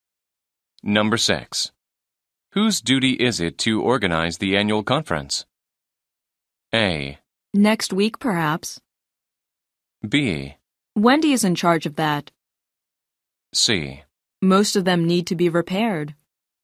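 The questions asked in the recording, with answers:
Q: Whose duty is it to organize the annual conference?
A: B: Wendy is in charge of that.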